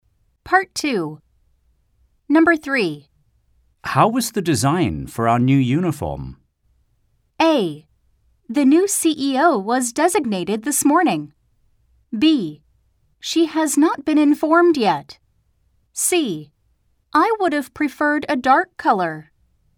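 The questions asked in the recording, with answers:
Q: How was the design for our new uniform?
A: C: I would have preferred a dark color.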